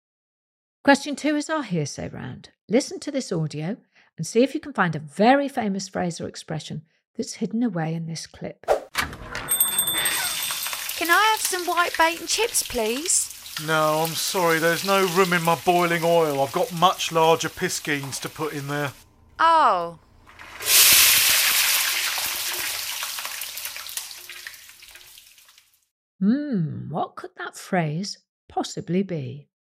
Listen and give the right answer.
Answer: the saying I was looking for was bigger fish to fry